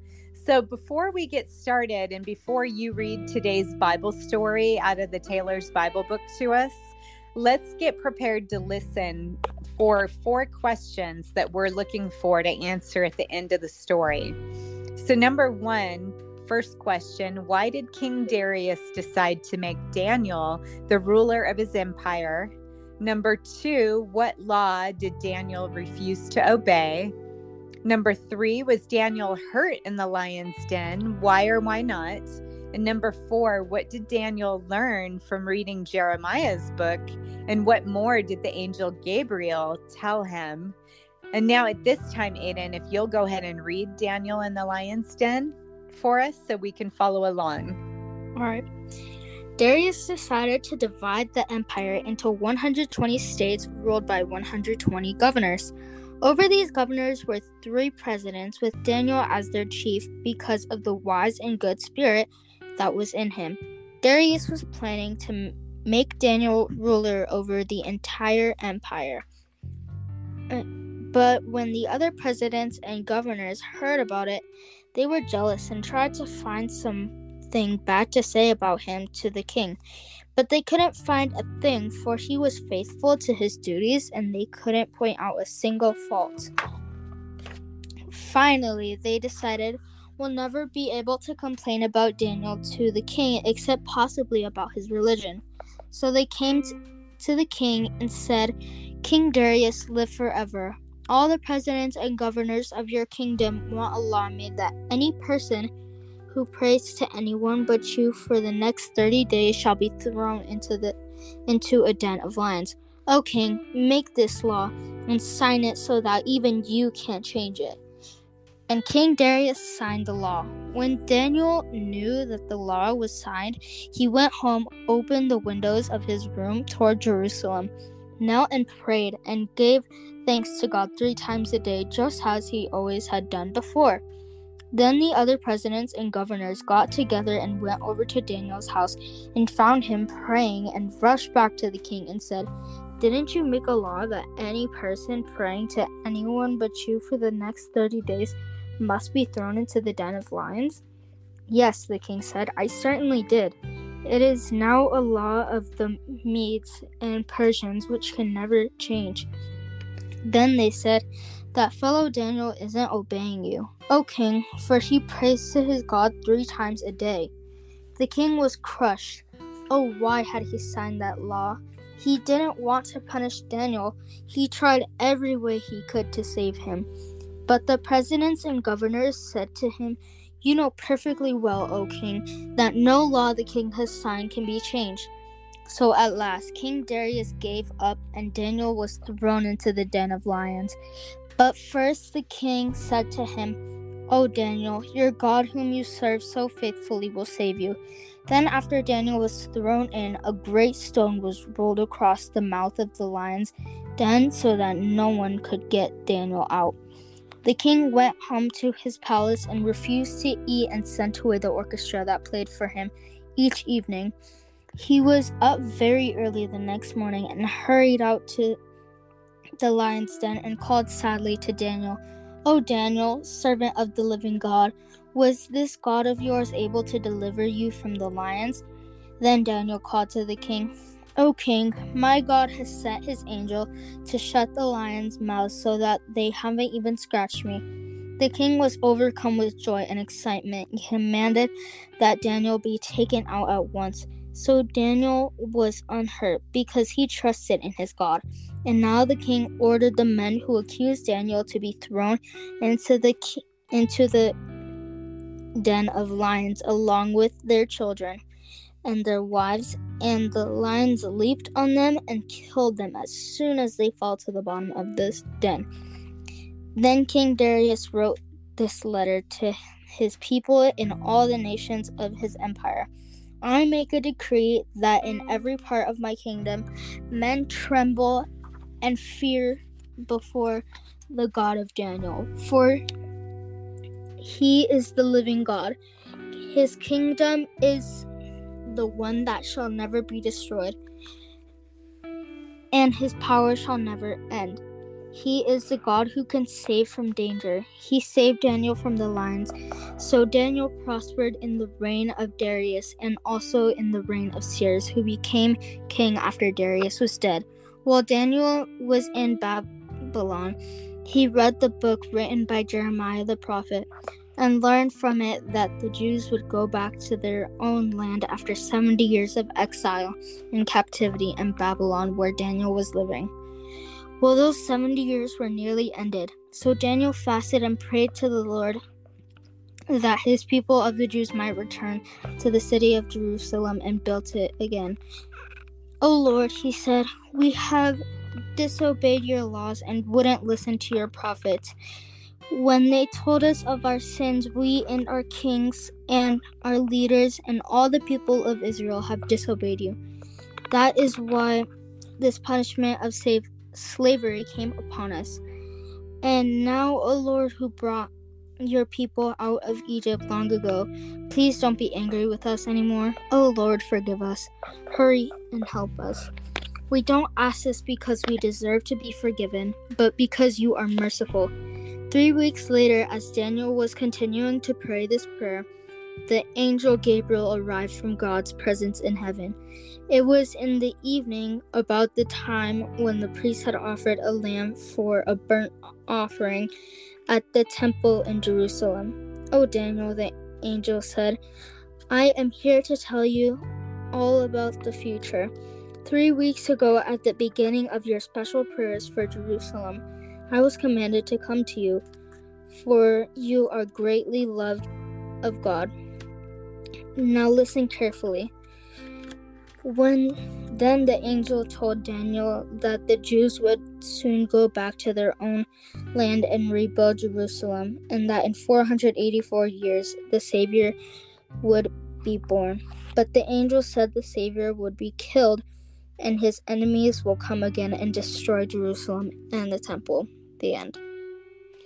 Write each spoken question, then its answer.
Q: why did King Darius decide to make Daniel the ruler of his empire?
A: Well, King Darius decided to make Daniel the ruler of his empire because Daniel was very faithful to his God, and King Darius could see that he was so faithful that his God saved him from those lions.

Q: what law did Daniel refuse to obey?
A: Daniel refused to obey the law that only he could pray to King Darius.

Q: was Daniel hurt in the lion's den?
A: Daniel was not hurt in the lion's den.

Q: what did Daniel learn from reading Jeremiah's book?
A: Well, Daniel learned from Jeremiah's book that the Jews would go back to their own land after 70 years of exile and captivity in Babylon, where Daniel was living.